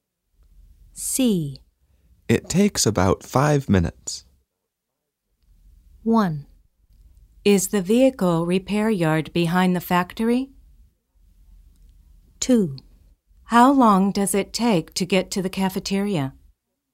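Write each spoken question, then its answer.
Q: It takes about 5 minutes.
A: 2: How long does it take to get to the cafeteria?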